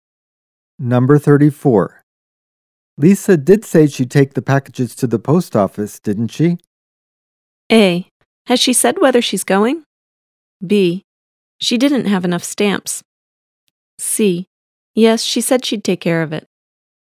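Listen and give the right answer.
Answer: C: Yes, she said she'd take care of it.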